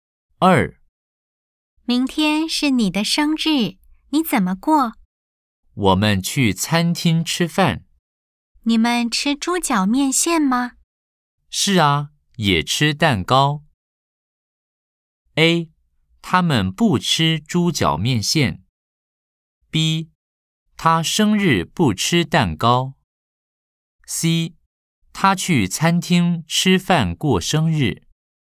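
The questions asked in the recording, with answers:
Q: A, 他们不吃猪脚面线。B, 他生日不吃蛋糕。 C, 他去餐厅吃饭过生日。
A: C: 他去餐厅吃饭过生日。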